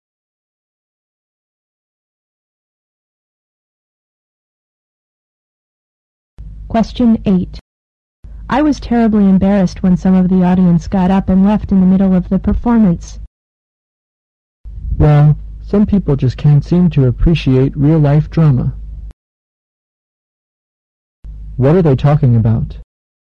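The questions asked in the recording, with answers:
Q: What are they talking about?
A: A play (a drama performance) that some audience members walked out of.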